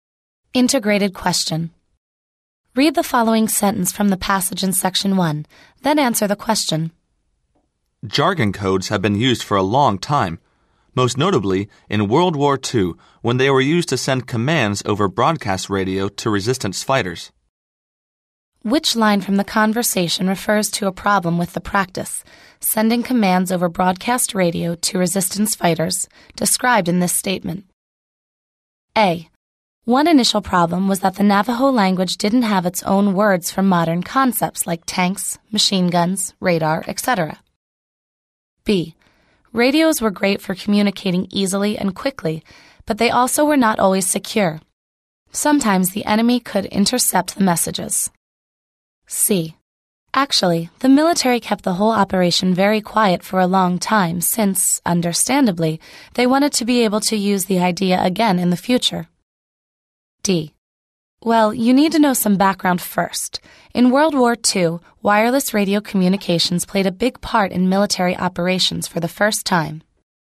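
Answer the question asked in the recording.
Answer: B: Radios were great for communicating easily and quickly, but they also were not always secure. Sometimes the enemy could intercept the messages.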